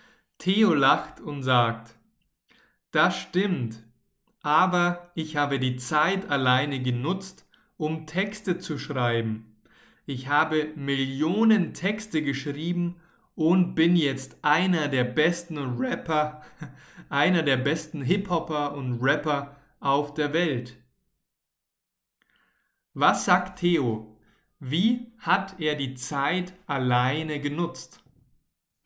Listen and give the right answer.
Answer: Um Texte zu schreiben.